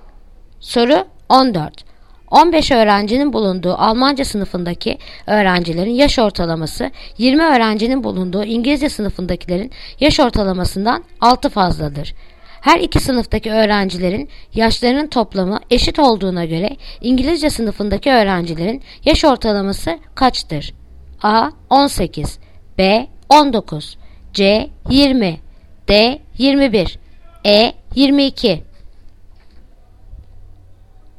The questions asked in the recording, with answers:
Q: Her iki sınıftaki öğrencilerin yaşlarının toplamı eşit olduğuna göre İngilizce sınıfındaki öğrencilerin yaş ortalaması kaçtır?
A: Yanıt Adana 18